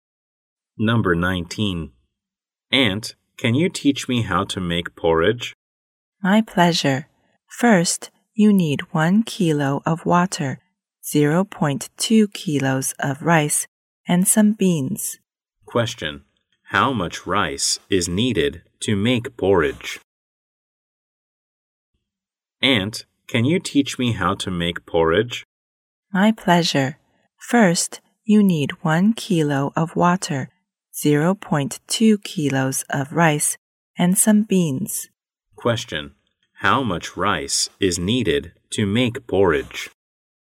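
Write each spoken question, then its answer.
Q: How much rice is needed to make porridge?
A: 0.2 kilos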